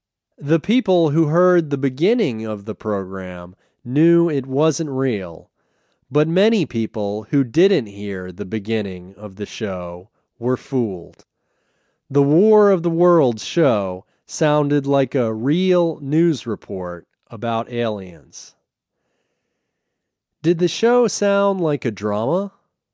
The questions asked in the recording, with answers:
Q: Did the show sound like a drama?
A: No, the show didn't sound like a drama.